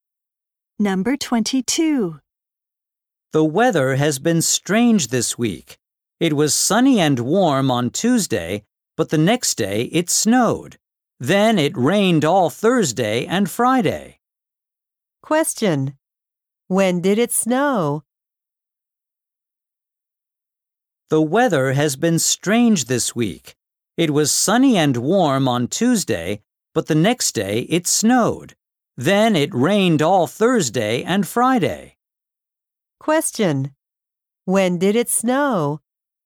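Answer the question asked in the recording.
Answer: On Wednesday.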